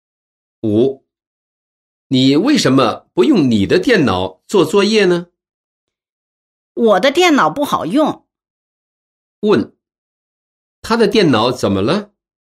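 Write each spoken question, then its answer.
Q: 问,他的电脑怎么了?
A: 不好用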